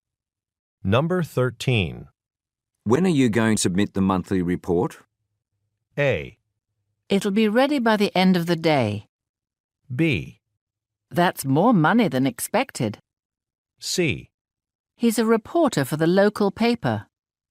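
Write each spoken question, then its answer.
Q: When are you going to submit the monthly report?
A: A: It'll be ready by the end of the day.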